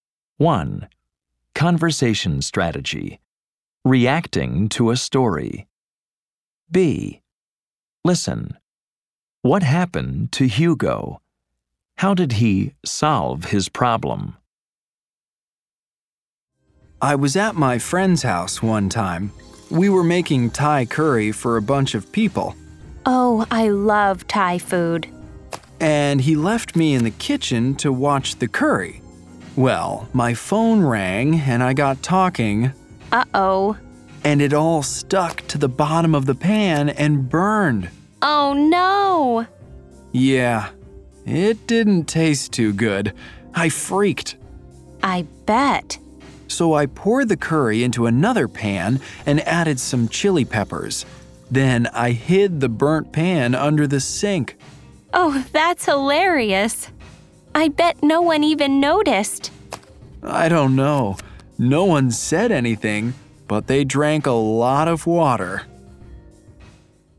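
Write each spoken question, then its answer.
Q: What happened to Hugo?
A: He was talking on the phone and the curry burned.

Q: How did he solve his problem?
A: He poured the curry into another pan, added chili peppers, and hid the burnt pan under the sink.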